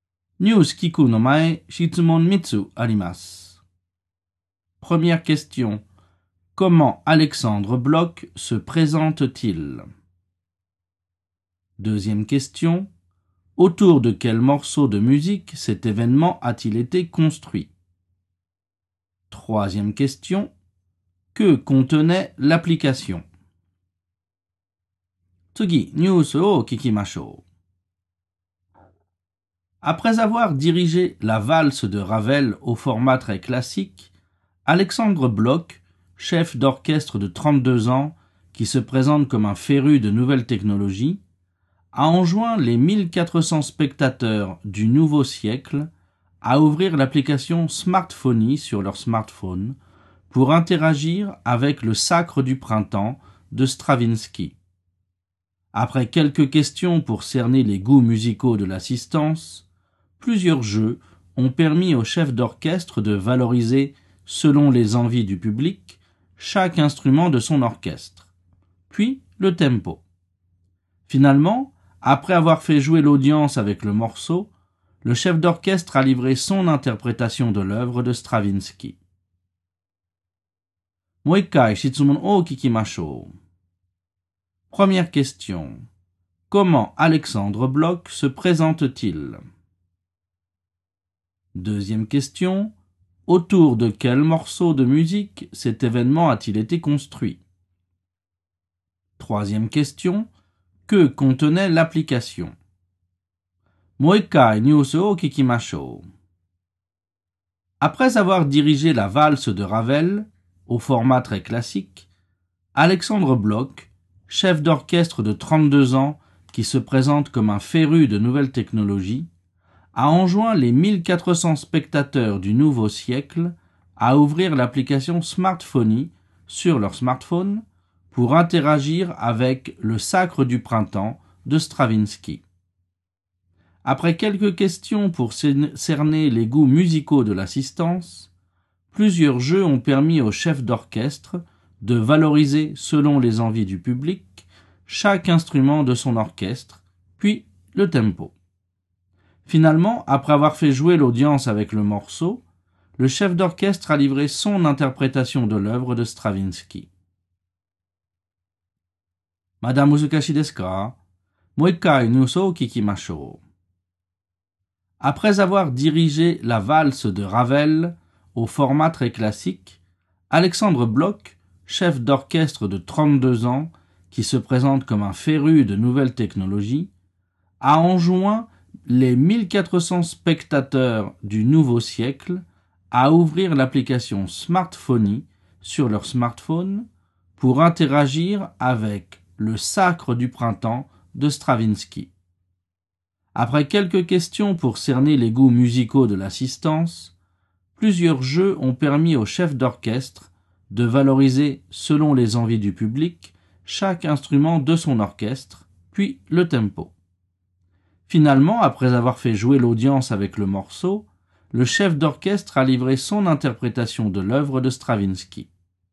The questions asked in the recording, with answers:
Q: Comment Alexandre Bloch se présente-t-il?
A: Alexandre Bloch se présente comme un féru de technologie.

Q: Autour de quel morceau de musique cet événement a-t-il été construit?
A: Cet événement a été construit autour du morceau de Stravinsky, Le Sacre du Printemps.

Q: Que contenait l'application?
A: L'application contenait un questionnaire et des jeux.